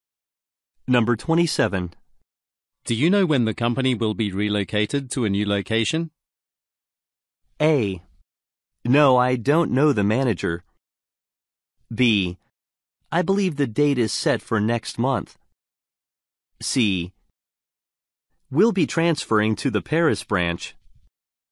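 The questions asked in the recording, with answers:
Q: Do you know when the company will be relocated to a new location?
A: B: I believe the date is set for next month.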